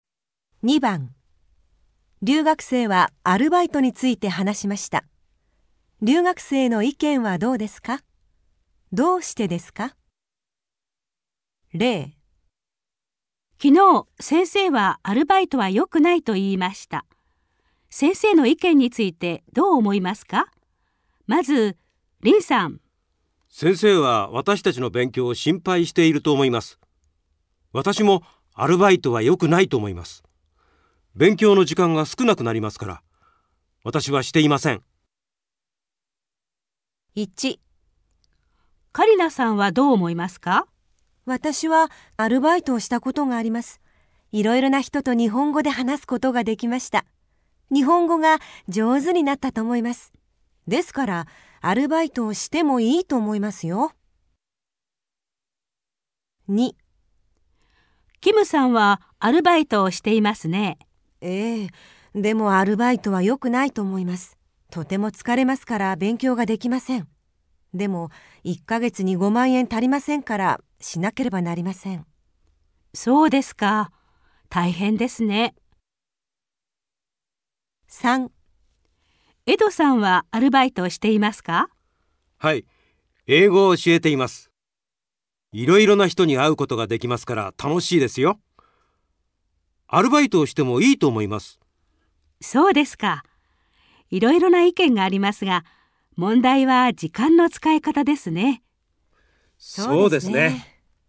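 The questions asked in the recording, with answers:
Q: 留学生の意見はどうですか?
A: カリナさん:アルバイトをしてもいい(いろいろな人と日本語で話せて、日本語が上手になったから)

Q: 留学生の意見はどうですか?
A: キムさん:アルバイトは良くない(とても疲れて勉強ができないから)

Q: 留学生の意見はどうですか?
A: エドさん:アルバイトをしてもいい(いろいろな人に会えて楽しいから)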